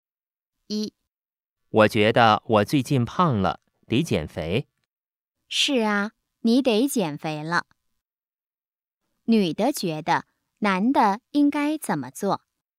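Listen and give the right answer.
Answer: 减肥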